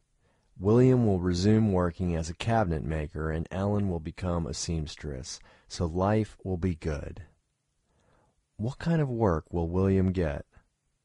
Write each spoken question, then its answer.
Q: What kind of work will William get?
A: William will work as a cabinet maker.